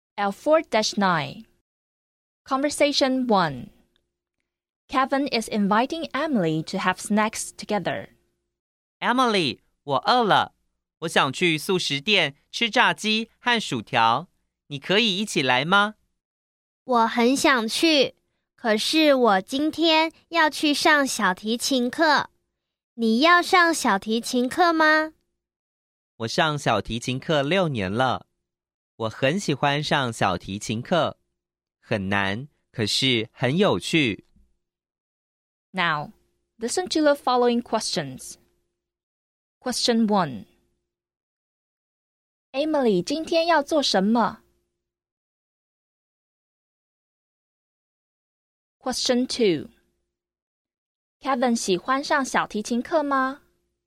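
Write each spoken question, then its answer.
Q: Emily, 今天要做什么?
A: 上小提琴课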